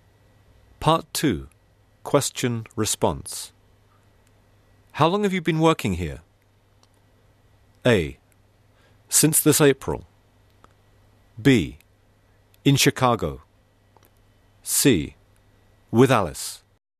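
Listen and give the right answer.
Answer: A: Since this April.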